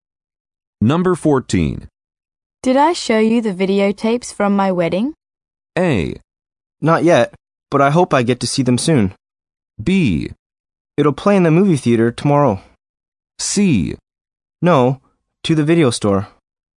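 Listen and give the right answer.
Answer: A: Not yet, but I hope I get to see them soon.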